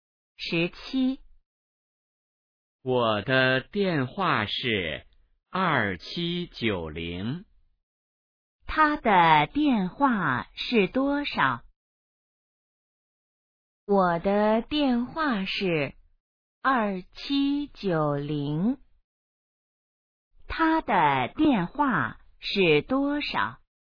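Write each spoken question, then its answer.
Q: 他的电话是多少?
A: 2790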